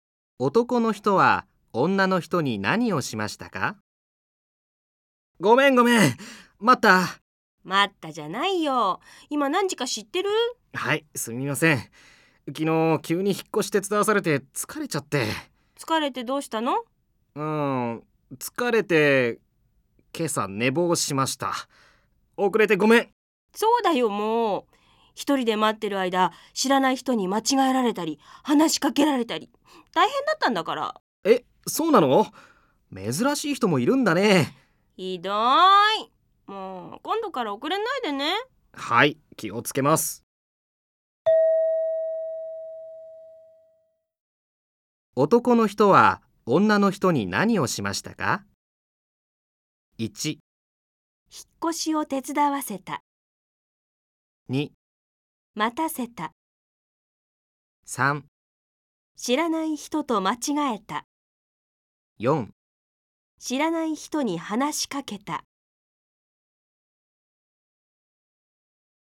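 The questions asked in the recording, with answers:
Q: 男の人は女の人に何をしましたか?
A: 2: 待たせた。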